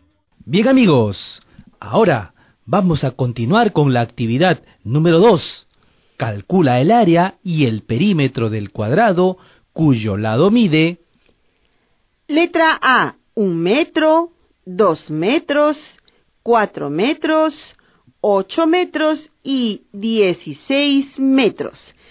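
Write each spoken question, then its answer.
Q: Calcula el área y el perímetro del cuadrado cuyo lado mide...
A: Áreas: 1, 4, 16, 64, 256 m2; perímetros: 4, 8, 16, 32, 64 m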